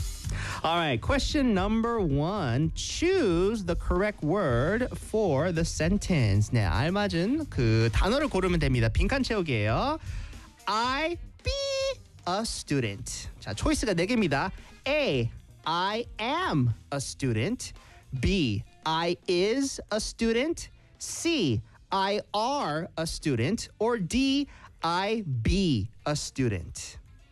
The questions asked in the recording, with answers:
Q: I be a student.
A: A. I am a student.